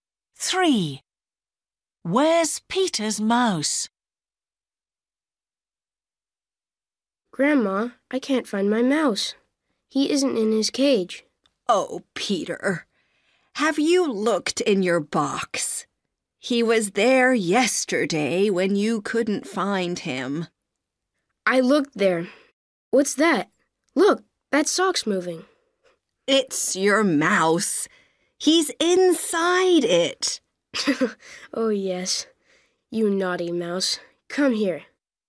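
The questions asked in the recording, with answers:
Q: Where's Peter's mouse?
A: inside the sock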